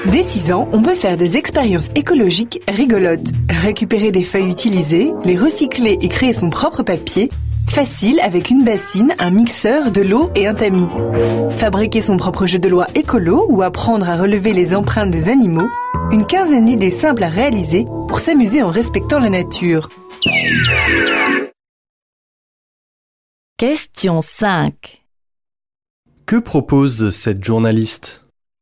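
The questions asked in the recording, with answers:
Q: Que propose cette journaliste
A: Des expériences écologiques amusantes pour les enfants dès 6 ans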